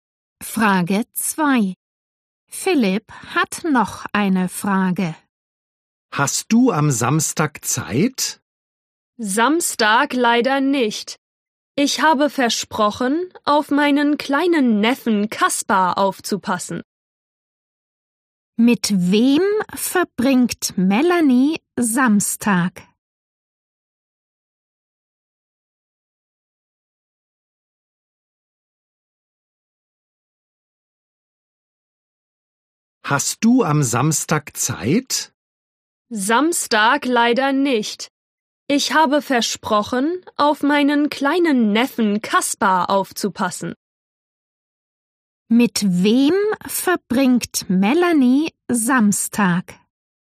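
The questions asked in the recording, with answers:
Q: Mit wem verbringt Melanie Samstag?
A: Mit ihrem kleinen Neffen Kaspar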